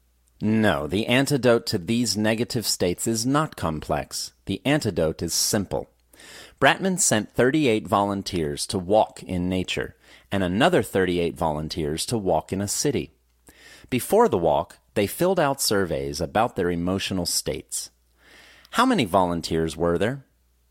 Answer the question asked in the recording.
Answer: There were a total of 76 volunteers.